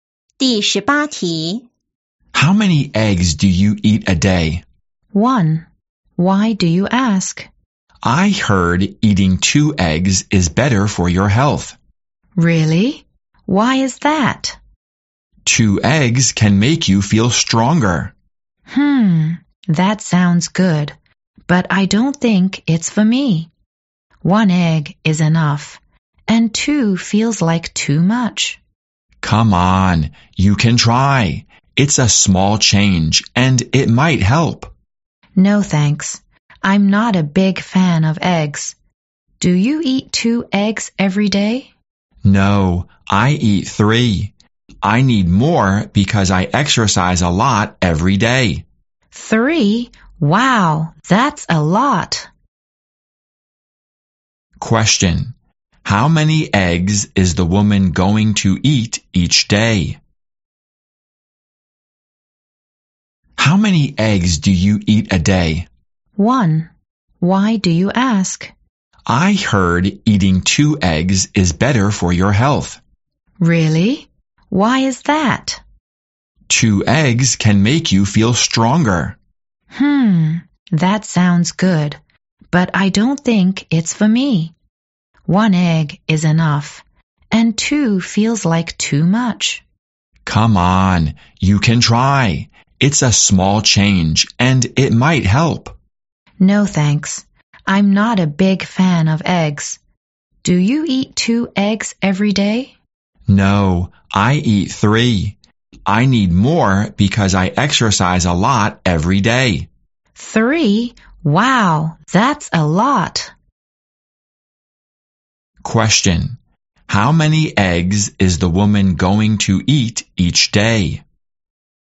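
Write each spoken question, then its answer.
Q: How many eggs is the woman going to eat each day?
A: One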